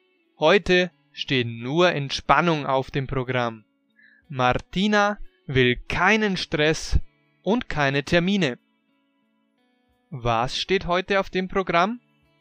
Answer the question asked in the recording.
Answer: Entspannung. Heute steht nur Entspannung auf dem Programm.